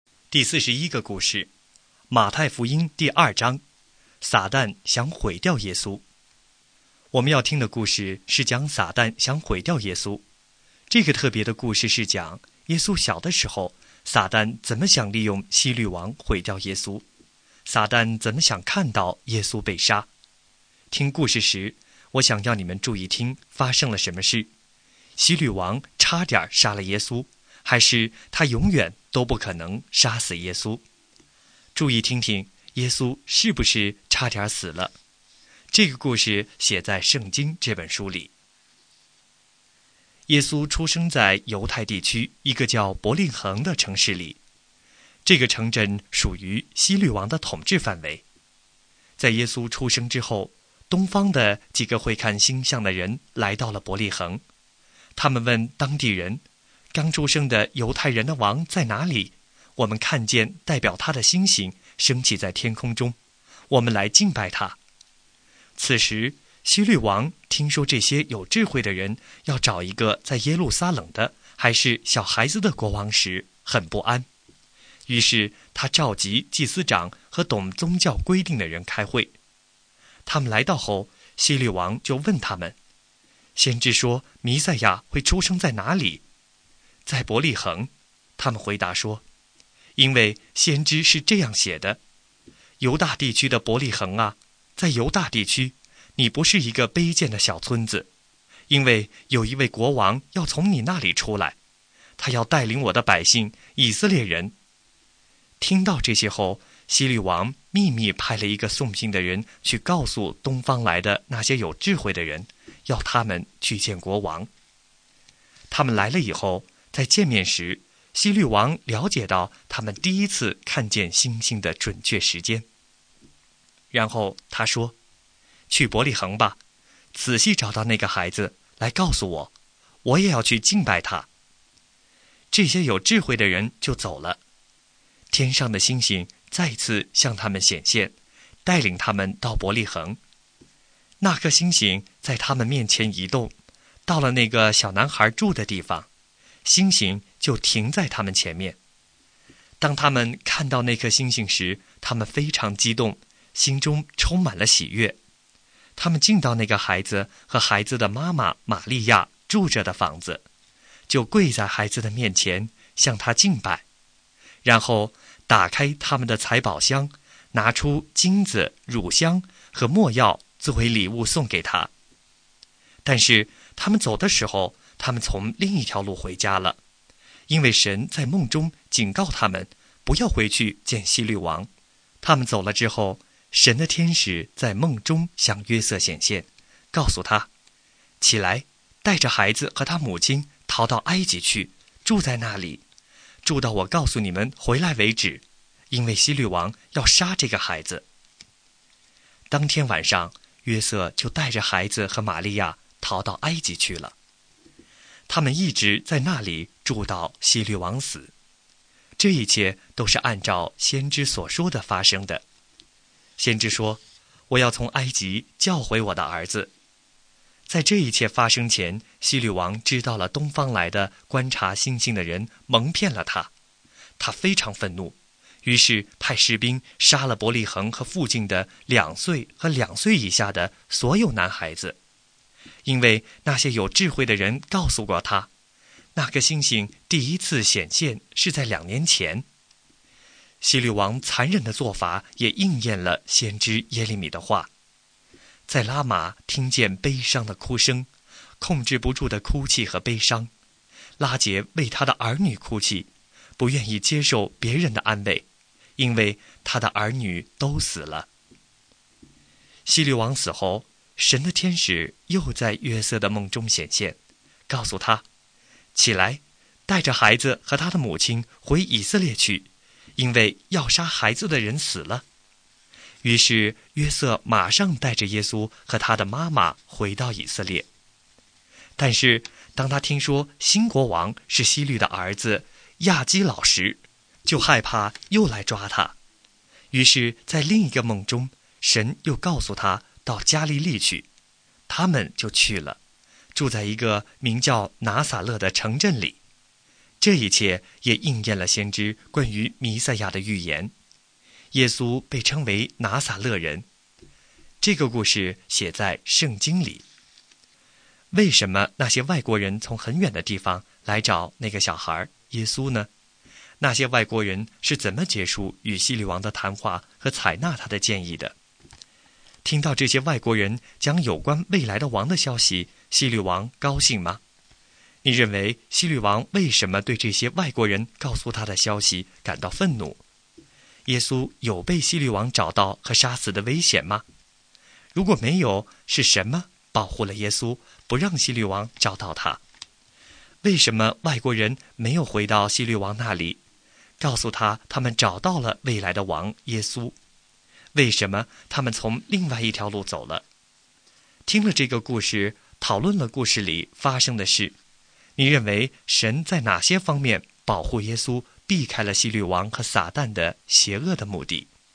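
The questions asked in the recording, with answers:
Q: 为什么那些外国人从很远的地方来找那个小孩耶稣呢?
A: 他们看见代表他的星星升起,来敬拜刚出生的犹太人的王

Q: 听到这些外国人讲有关未来的王的消息,希律王高兴吗?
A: 不高兴,他很不安

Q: 为什么外国人没有回到希律王那里,告诉他他们找到了未来的王耶稣?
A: 因为神在梦中警告他们不要回去见希律王

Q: 为什么他们从另外一条路走了?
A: 因为神在梦中警告他们不要回去见希律王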